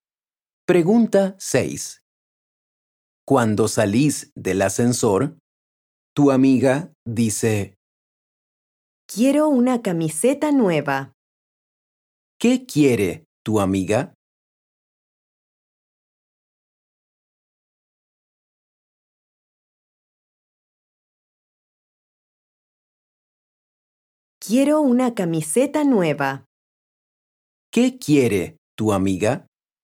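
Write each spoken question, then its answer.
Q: ¿Qué quiere tu amiga?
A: una camiseta nueva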